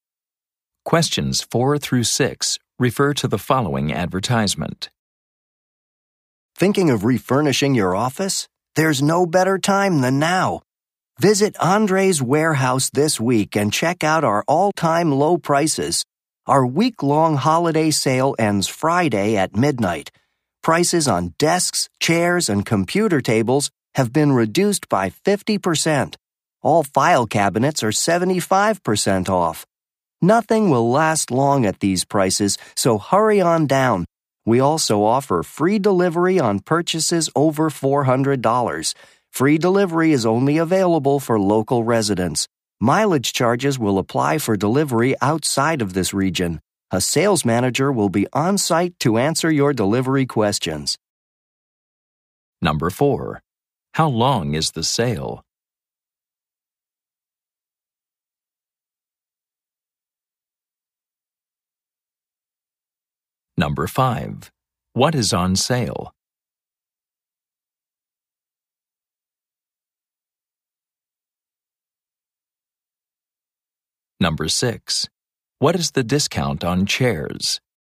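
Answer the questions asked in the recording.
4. One week
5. Office furniture
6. 50%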